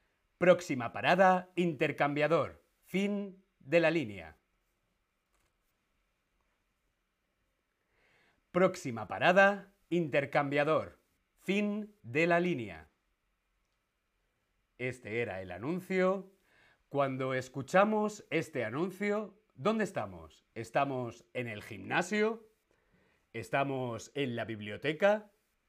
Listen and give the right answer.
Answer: estamos en el transporte público